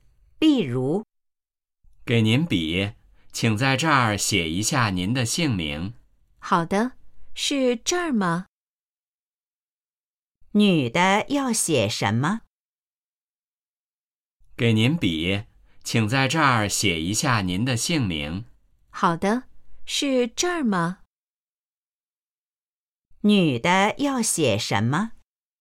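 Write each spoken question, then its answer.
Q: 女的要写什么?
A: 姓名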